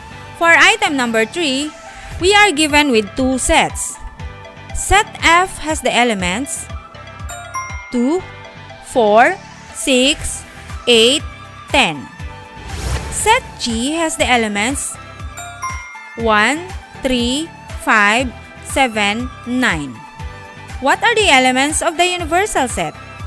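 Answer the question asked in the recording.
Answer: 1, 2, 3, 4, 5, 6, 7, 8, 9, 10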